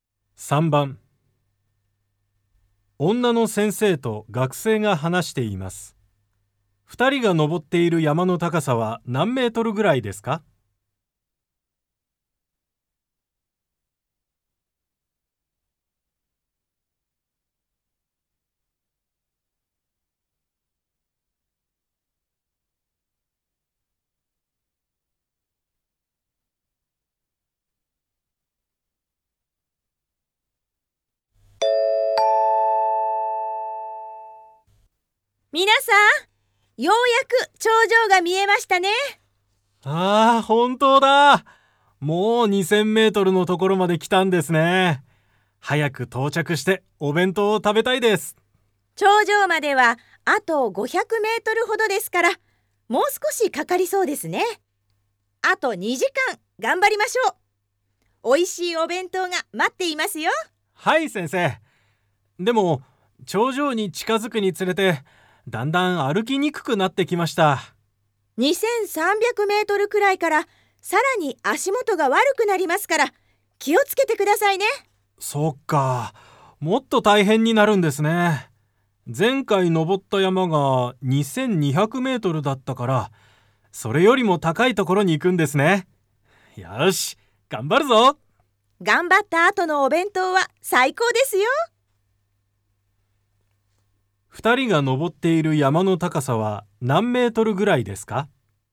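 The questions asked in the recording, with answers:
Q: 二人が登っている山の高さは何メートルぐらいですか?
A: 2500メートルぐらい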